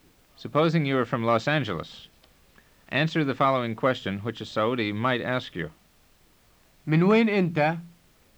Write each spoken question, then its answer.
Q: Supposing you are from Los Angeles, answer the following question, which a Saudi might ask you. من وين أنت؟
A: أنا من مدينة لوس أنجلوس.